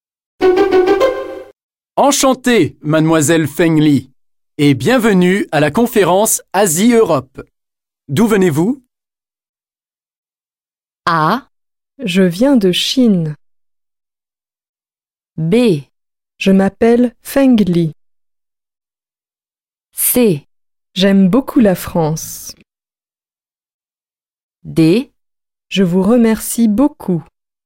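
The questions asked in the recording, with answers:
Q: D'où venez-vous?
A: A: Je viens de Chine.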